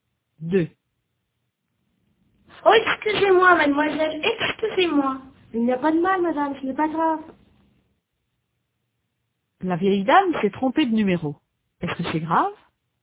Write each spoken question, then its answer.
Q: Est-ce que c'est grave?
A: Non, ce n'est pas grave. Il n'y a pas de mal.